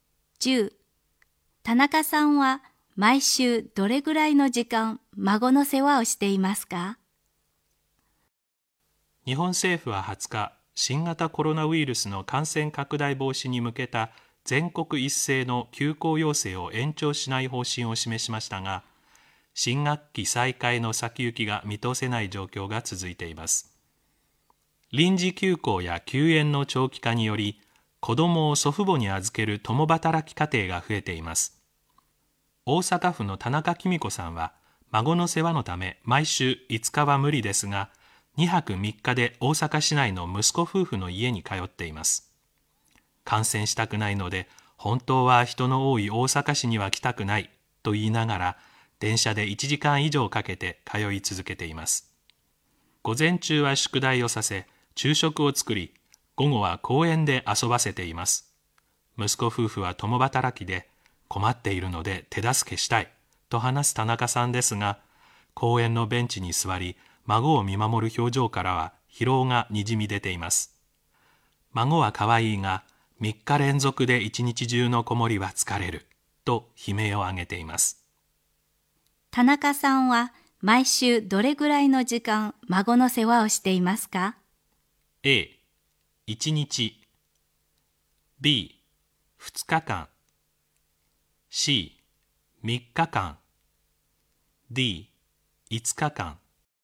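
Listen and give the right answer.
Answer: C: 3日間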